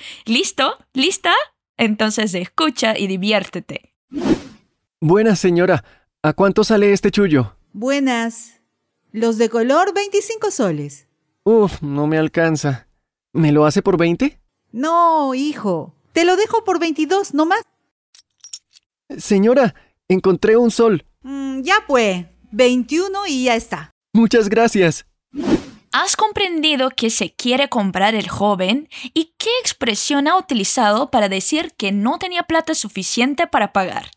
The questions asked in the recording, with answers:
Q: ¿Has comprendido que se quiere comprar el joven y qué expresión ha utilizado para decir que no tenía plata suficiente para pagar?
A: el chullo es un gorro de lana que nos cubre las orejas cuando hace mucho frío.